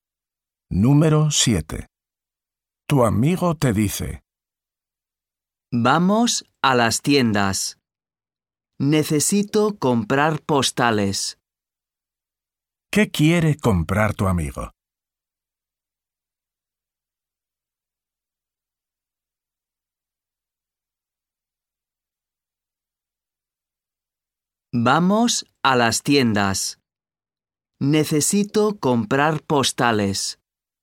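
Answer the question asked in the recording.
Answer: Postales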